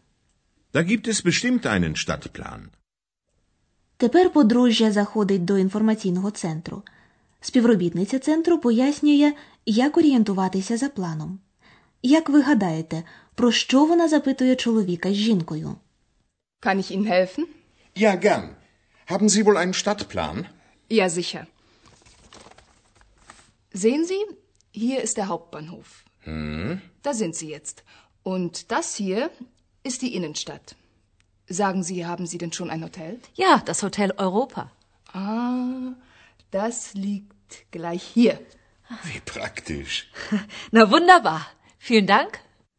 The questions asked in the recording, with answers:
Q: Як ви гадаєте, про що вона запитує чоловіка з жінкою?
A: І запитує, чи вони вже мають номери готелі?